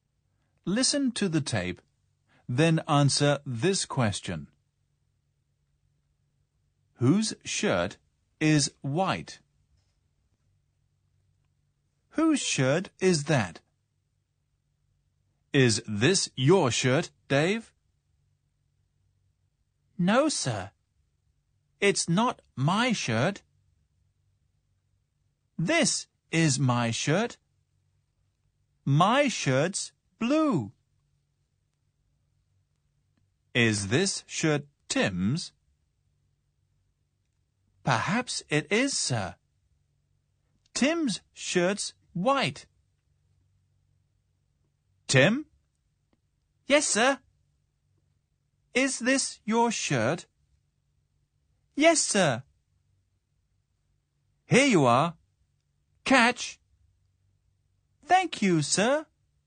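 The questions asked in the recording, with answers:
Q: Whose shirt is white?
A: Tim's shirt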